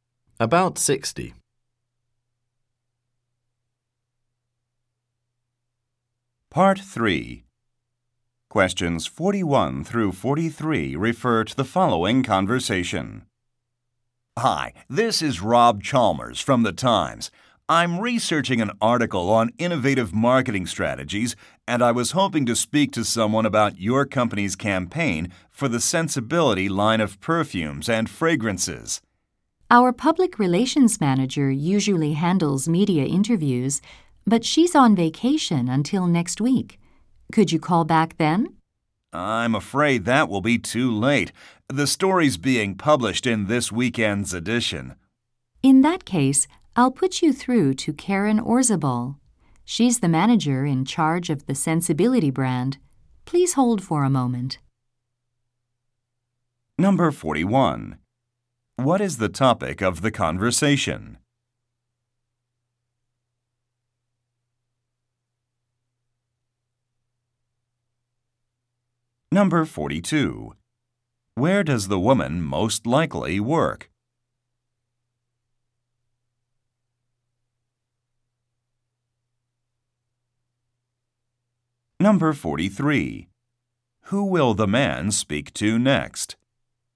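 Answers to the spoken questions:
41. A marketing campaign for a line of perfumes
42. At a perfume and fragrance company
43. Karen Orzabal, the Sensibility brand manager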